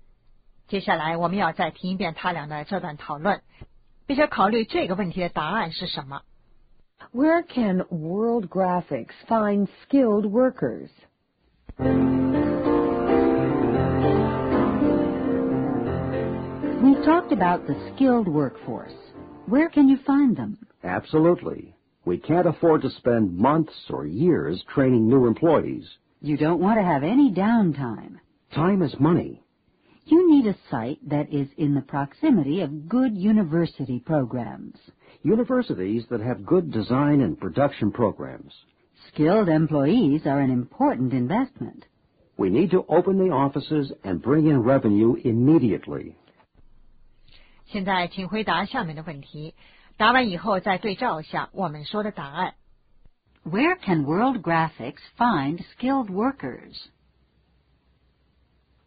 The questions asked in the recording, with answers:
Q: Where can World Graphics find skilled workers?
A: Good university programs.